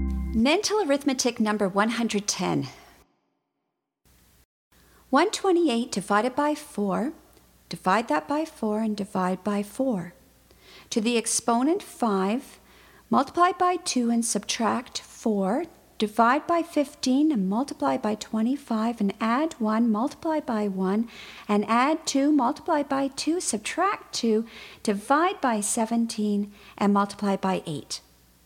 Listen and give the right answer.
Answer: And the answer is 96.